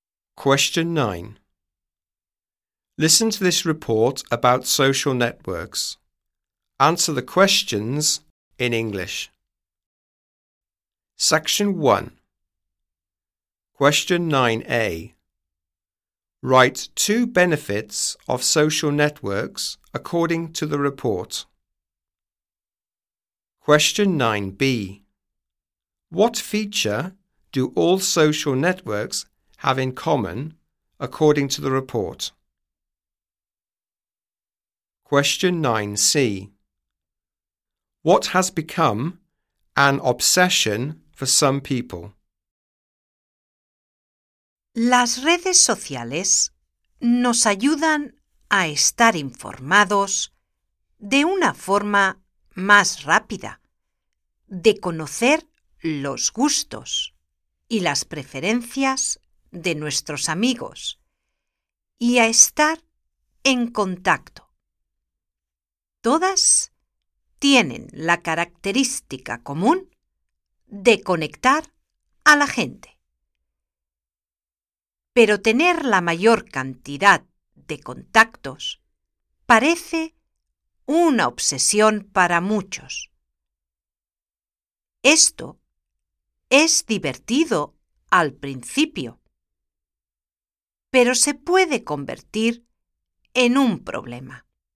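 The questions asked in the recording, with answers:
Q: Write 2 benefits of social networks according to the report.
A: Keep informed faster; know friends' tastes and preferences; stay in contact

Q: What feature do all social networks have in common, according to the report?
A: They connect people

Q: What has become an obsession for some people?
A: Having the most contacts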